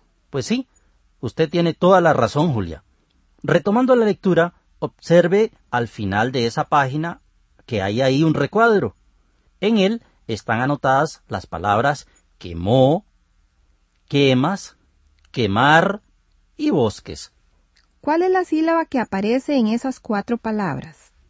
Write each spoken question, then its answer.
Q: ¿Cuál es la sílaba que aparece en esas cuatro palabras?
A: Claro, esa sílaba es la que.